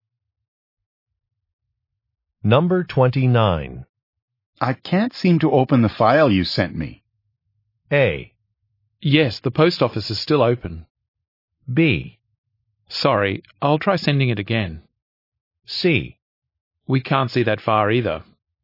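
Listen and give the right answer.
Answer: B: Sorry, I'll try sending it again.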